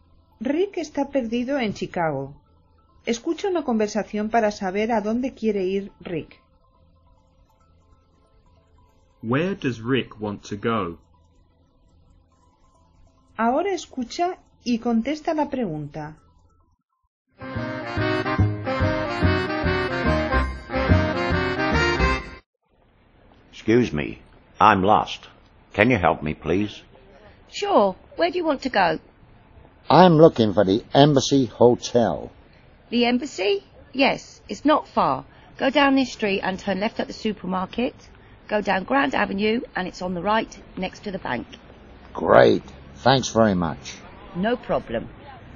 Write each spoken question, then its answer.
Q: Where does Rick want to go?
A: To the Embassy Hotel.